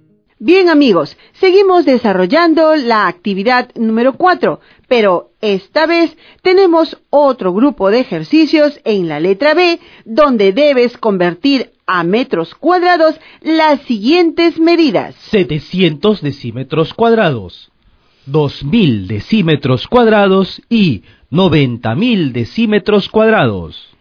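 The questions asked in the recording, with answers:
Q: Amigos, seguimos desarrollando la actividad número 4, pero esta vez tenemos otro grupo de ejercicios en la letra B, donde debes convertir a metros cuadrados las siguientes medidas.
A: 7 m2, 20 m2 y 900 m2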